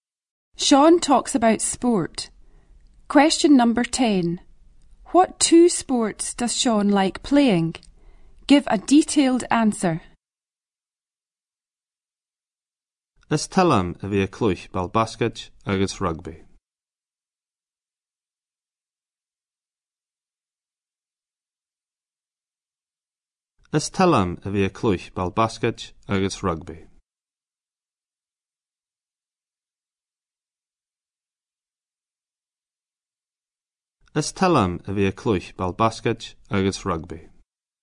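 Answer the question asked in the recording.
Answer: Basketball and rugby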